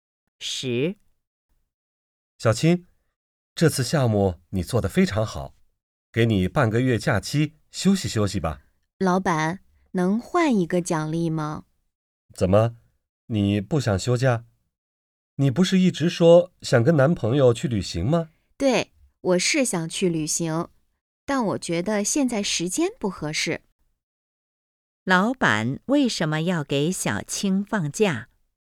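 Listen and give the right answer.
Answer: 项目做得非常好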